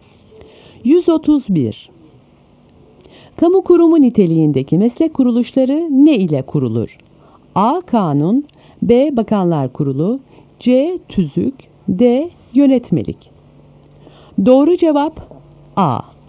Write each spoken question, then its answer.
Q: Kamu kurumu niteliğindeki meslek kuruluşları ne ile kurulur?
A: Doğru cevap A.